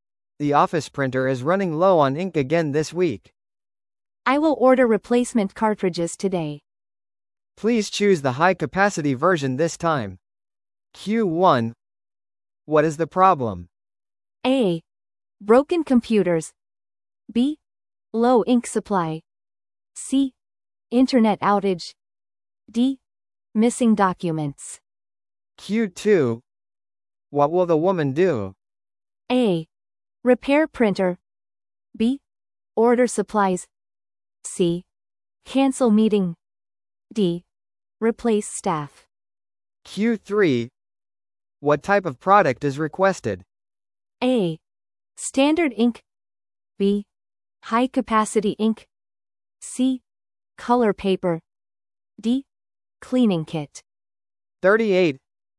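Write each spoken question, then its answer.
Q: What is the problem?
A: B: Low ink supply.

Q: What will the woman do?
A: B: Order supplies.

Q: What type of product is requested?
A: B: High capacity ink.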